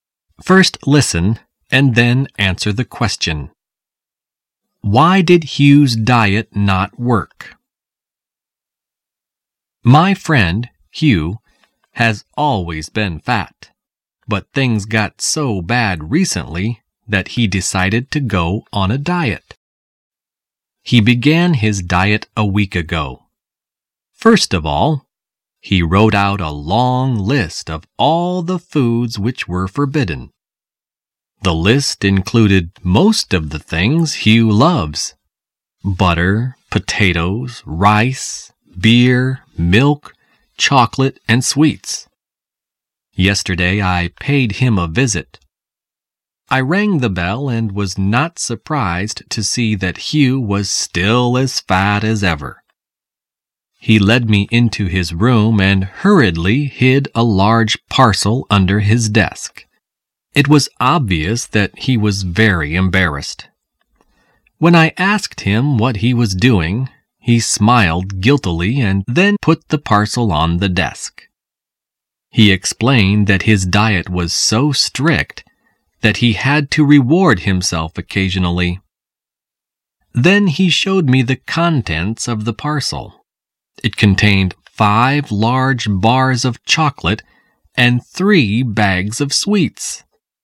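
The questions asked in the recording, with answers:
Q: Why did Hugh's diet not work?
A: He kept rewarding himself with chocolate and sweets.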